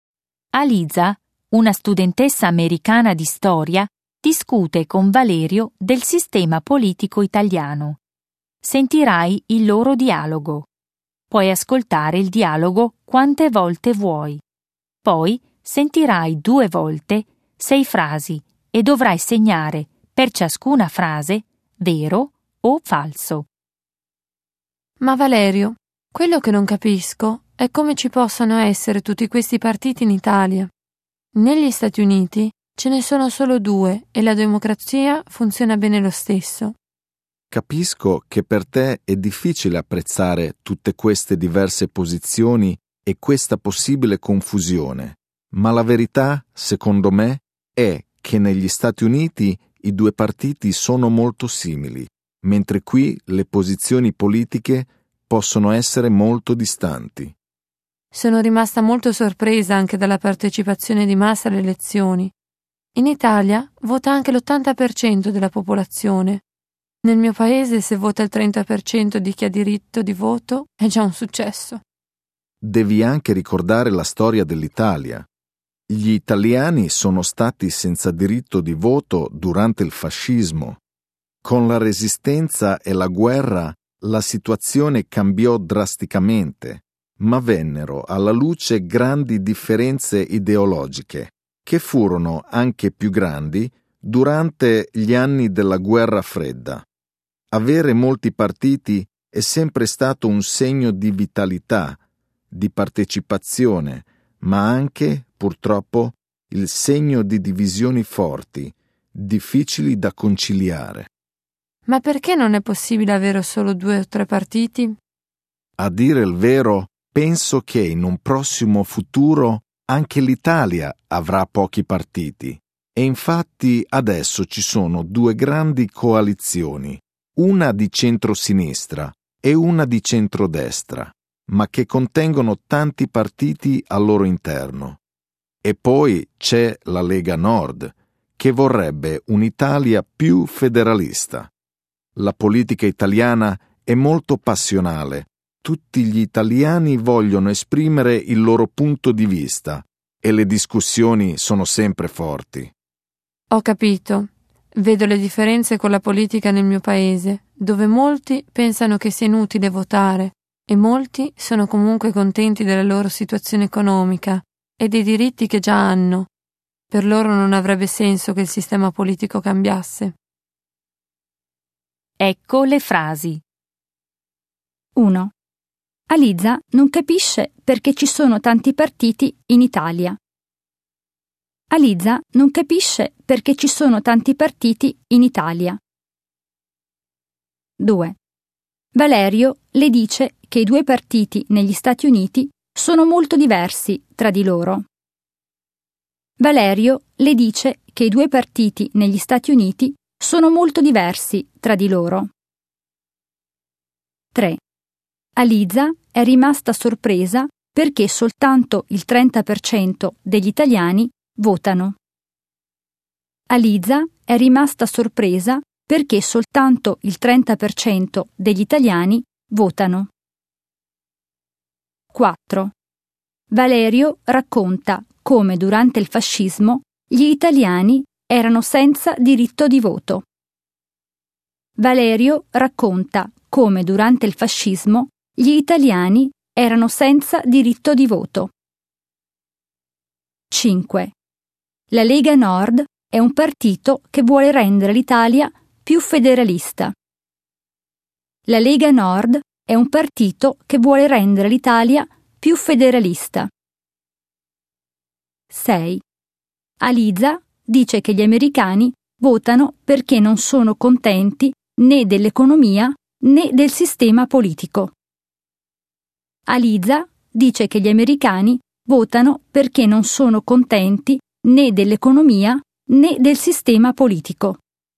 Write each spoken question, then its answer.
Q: Aliza non capisce perché ci sono tanti partiti in Italia.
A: 1. Vero.

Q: Valerio le dice che i 2 partiti negli Stati Uniti sono molto diversi tra di loro.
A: 2. Falso.

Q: Aliza è rimasta sorpresa perché soltanto il 30% degli italiani votano.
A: 3. Falso.

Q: Valerio racconta come durante il fascismo gli italiani erano senza diritto di voto.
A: 4. Vero.

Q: La Lega Nord è un partito che vuole rendere l'Italia più federalista.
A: 5. Vero.

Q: Aliza dice che gli americani votano perché non sono contenti né dell'economia né del sistema politico.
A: 6. Falso.